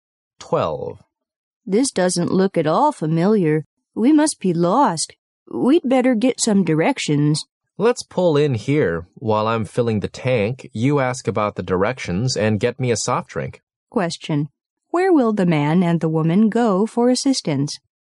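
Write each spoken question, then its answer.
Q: where will the man and the woman go for assistance?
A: A gas station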